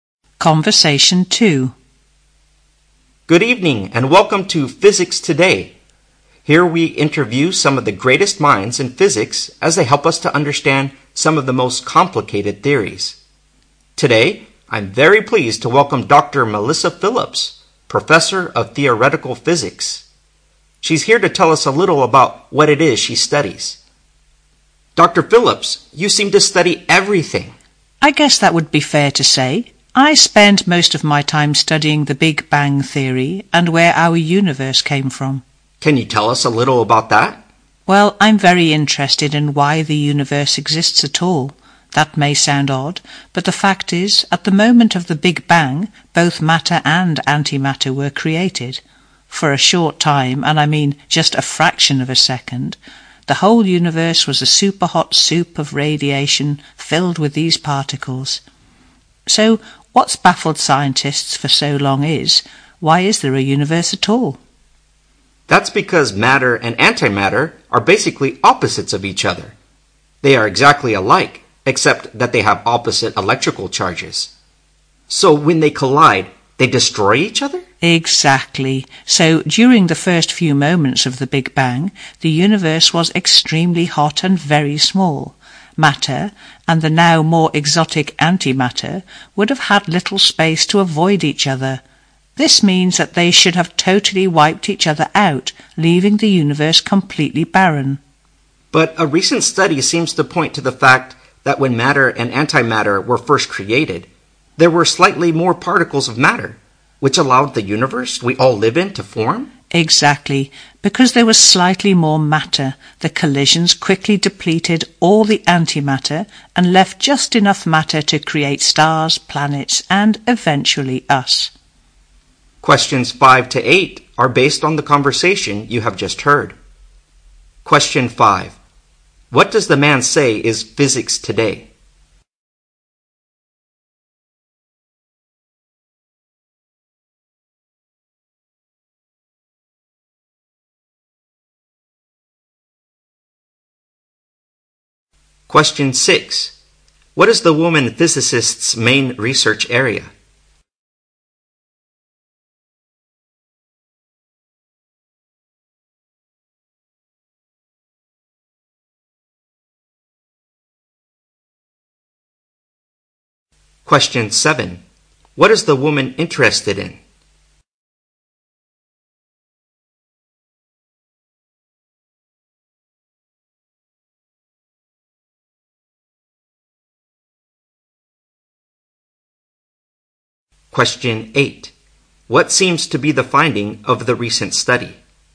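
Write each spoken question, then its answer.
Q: What does the man say is physics today?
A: A program interviewing great minds in physics

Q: What is the woman physicist's main research area?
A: The Big Bang Theory and the origin of the universe

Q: What is the woman interested in?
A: Why the universe exists at all

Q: What seems to be the finding of the recent study?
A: Slightly more matter than antimatter was created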